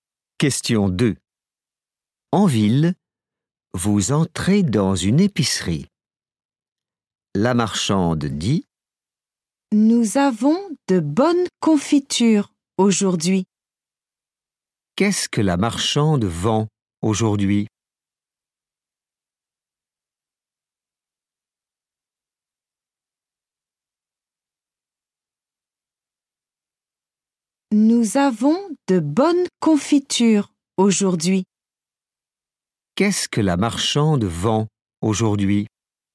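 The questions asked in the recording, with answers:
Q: Qu'est-ce que la marchande vend aujourd'hui ?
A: de la confiture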